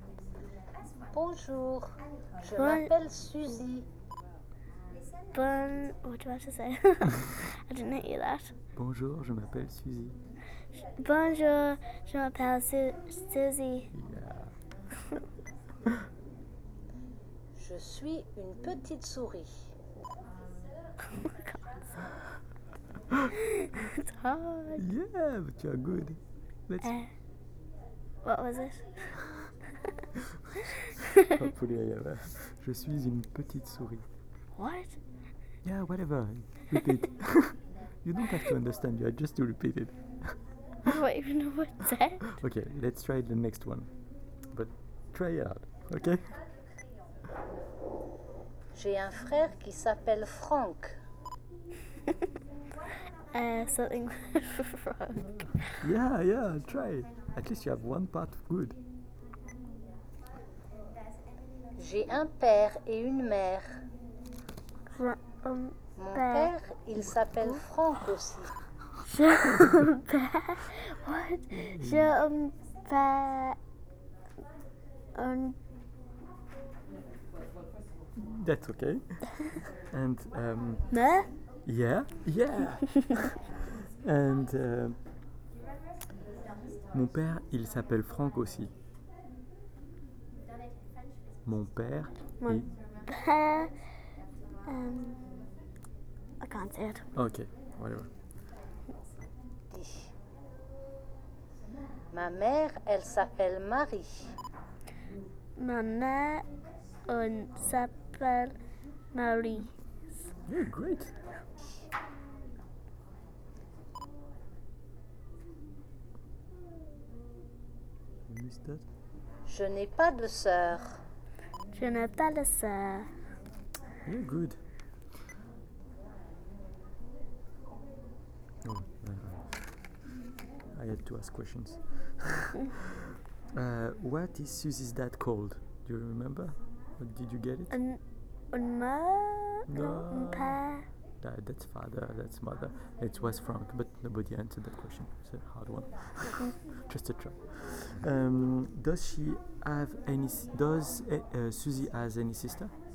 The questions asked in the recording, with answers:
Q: what is Suzy's dad called?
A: It was Frank

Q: Suzy has any sister?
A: No